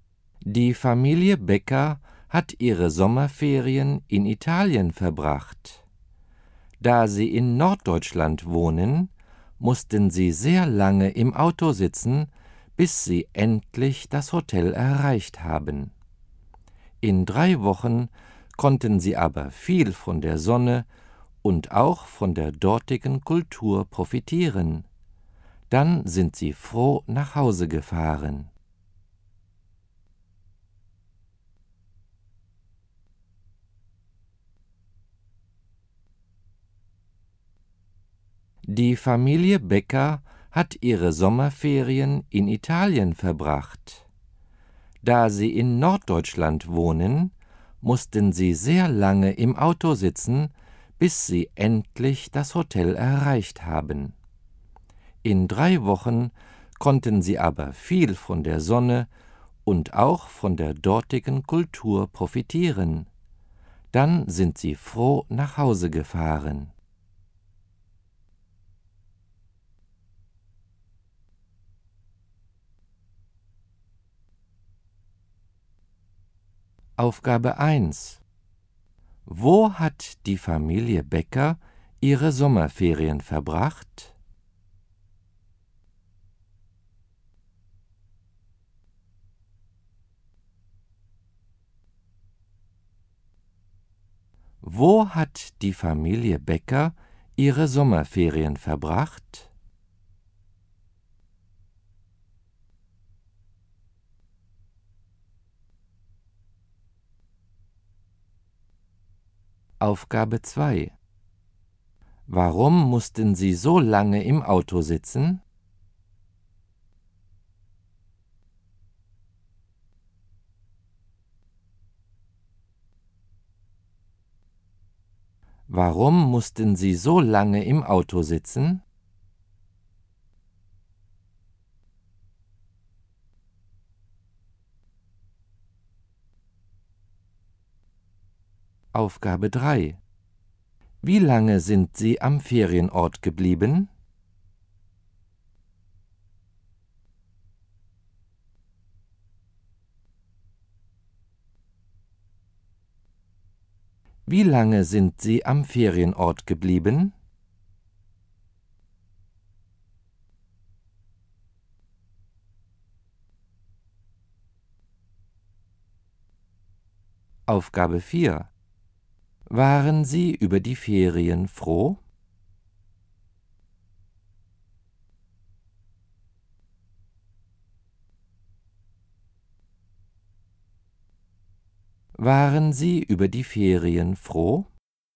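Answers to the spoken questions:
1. In Italien
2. Weil sie in Norddeutschland wohnen
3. 3 Wochen
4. Ja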